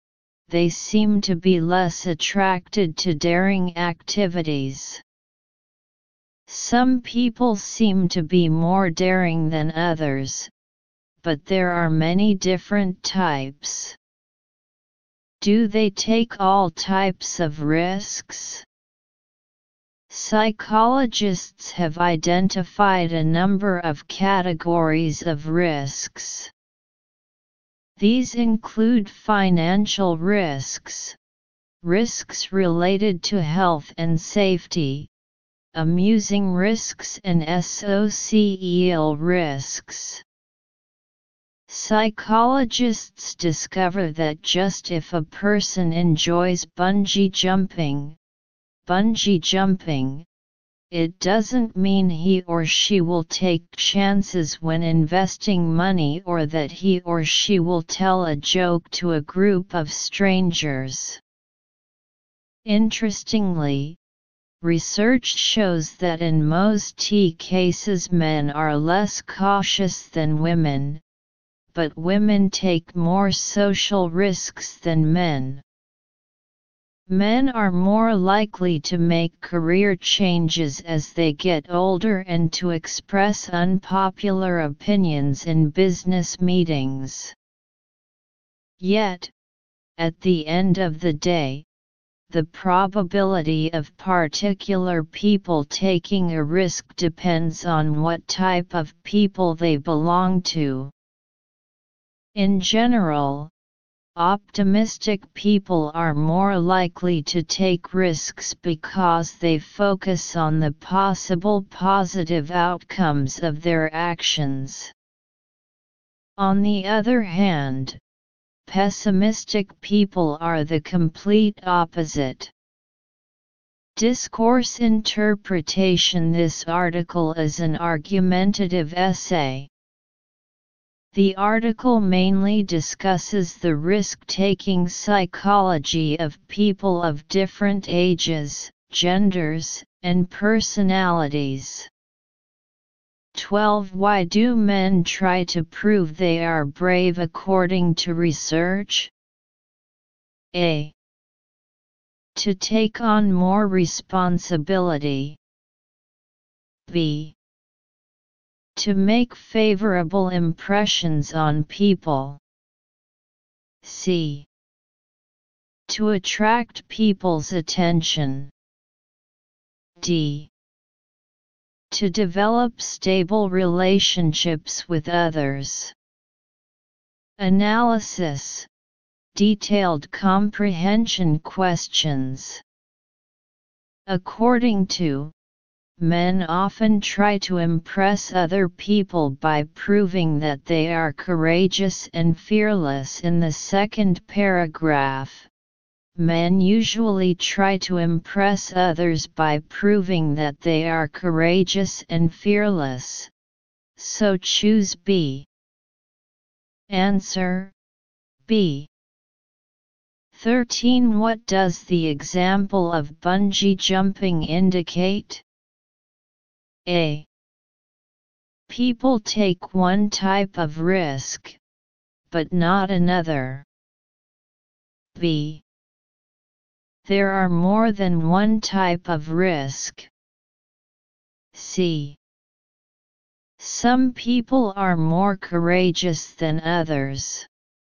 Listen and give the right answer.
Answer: Answer A